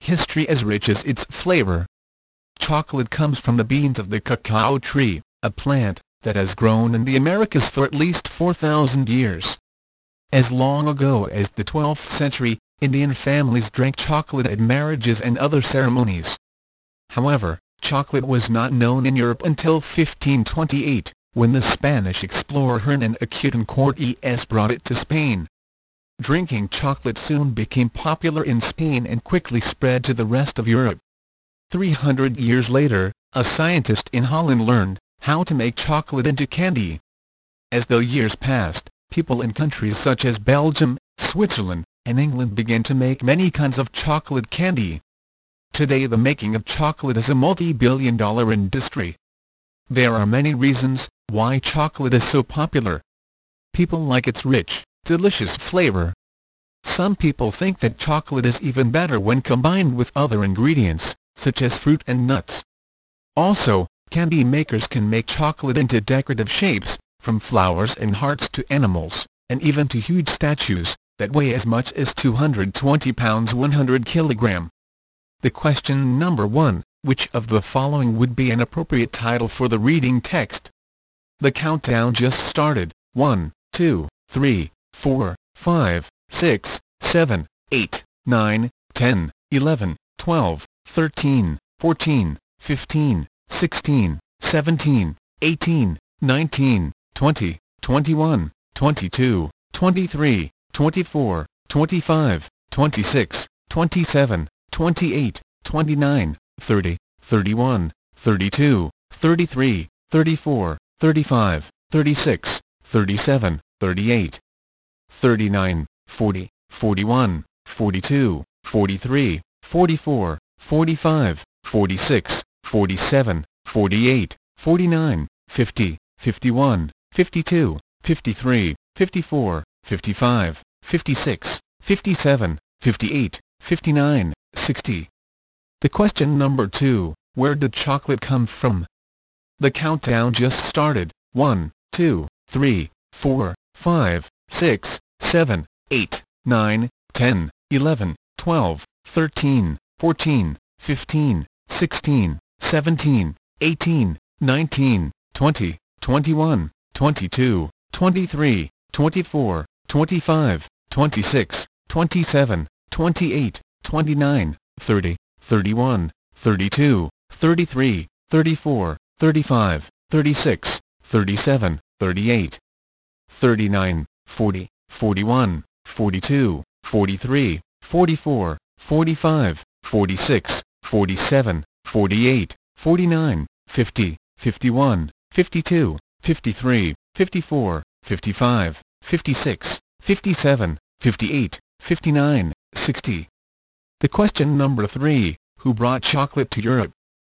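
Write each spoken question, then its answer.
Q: where did chocolate come from?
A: From the beans of the cacao tree, grown in the Americas

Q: who brought chocolate to Europe?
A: The Spanish explorer Hernan Cortes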